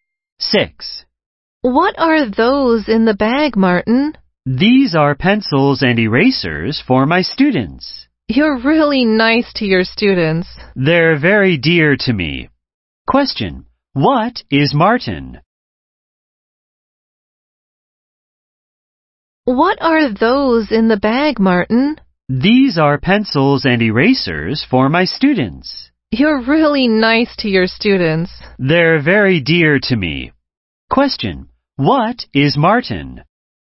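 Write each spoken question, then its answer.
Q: What is Martin?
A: A teacher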